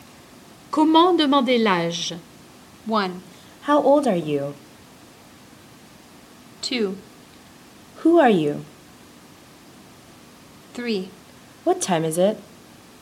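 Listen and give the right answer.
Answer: 1: How old are you?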